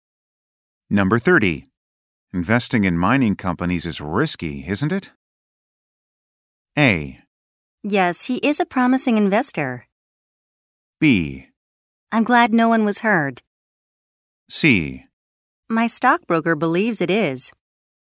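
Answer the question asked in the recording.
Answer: C: My stockbroker believes it is.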